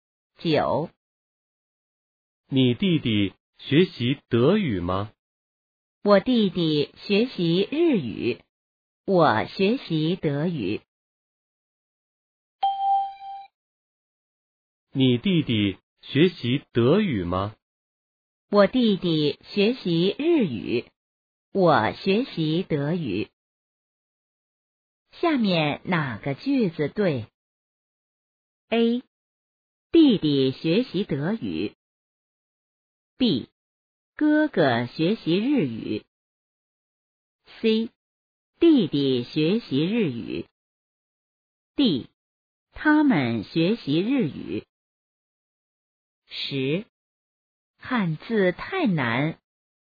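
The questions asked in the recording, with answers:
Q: 下面哪个句子对?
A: C: 弟弟学习日语。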